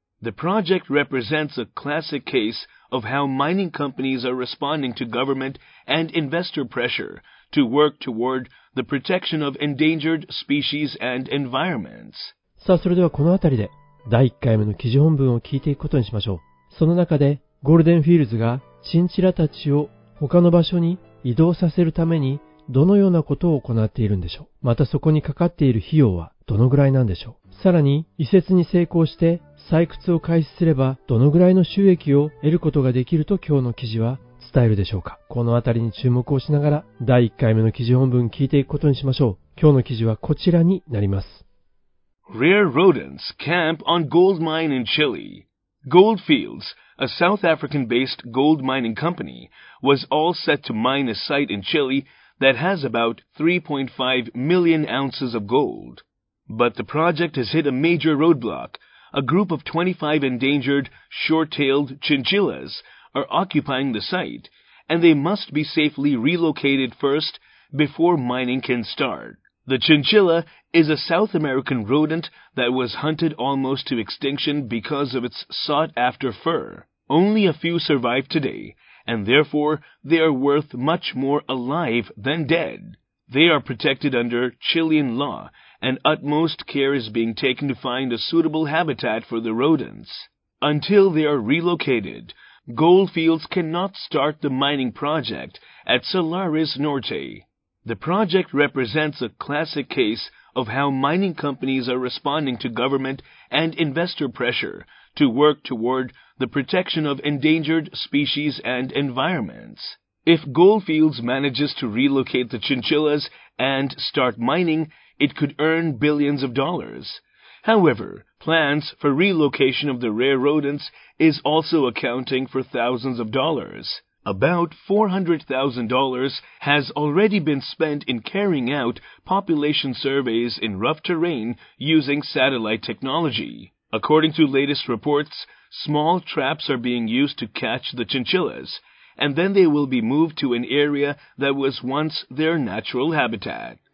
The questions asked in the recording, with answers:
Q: またそこにかかっている費用はどのぐらいなんでしょう。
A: もうすでに約40万ドルが has already been spent、 費やされている。

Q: さらに移設に成功して採掘を開始すればどのぐらいの収益を得ることができると今日の記事は伝えるでしょうか。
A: it could earn billions of dollars、 数十億ドルの利益を得ることができるだろう。